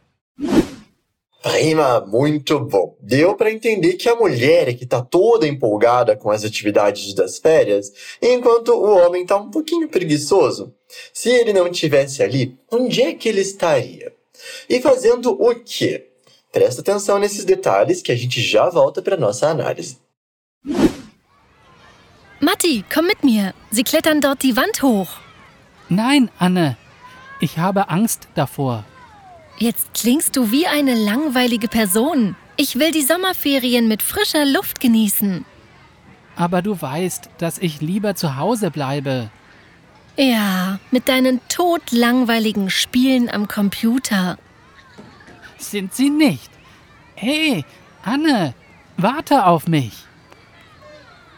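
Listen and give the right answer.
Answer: Em casa, jogando no computador.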